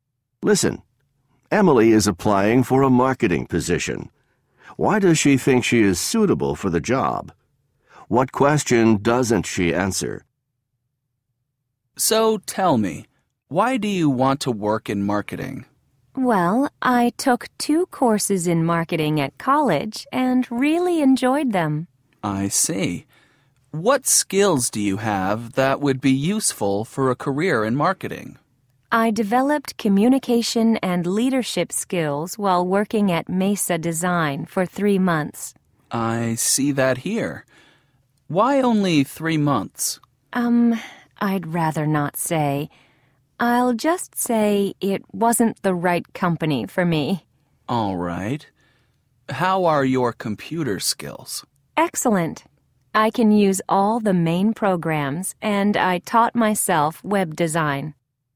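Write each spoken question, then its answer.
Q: Why does she think she is suitable for the job?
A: She took marketing courses, has communication and leadership skills, and has excellent computer skills

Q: What question doesn't she answer?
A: Why she worked at Mesa Design for only 3 months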